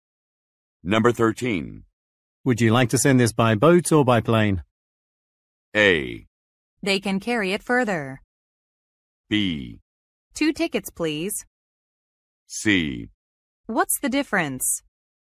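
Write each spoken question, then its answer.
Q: Would you like to send this by boat or by plane?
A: C: What's the difference?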